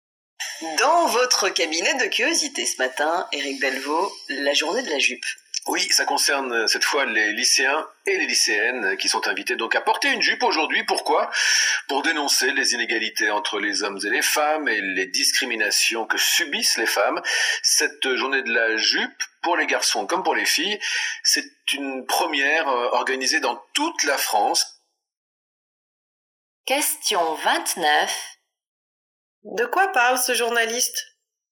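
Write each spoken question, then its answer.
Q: De quoi parle ce journaliste ?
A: De la journée de la jupe, où les lycéens et lycéennes sont invités à porter une jupe pour dénoncer les inégalités entre les hommes et les femmes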